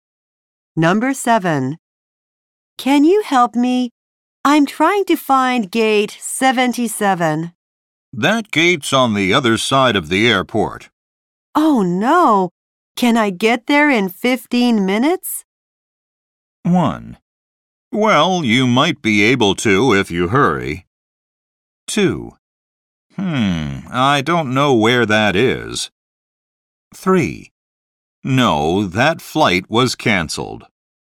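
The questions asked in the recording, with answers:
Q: Oh no! Can I get there in 15 minutes?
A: 1: Well, you might be able to if you hurry.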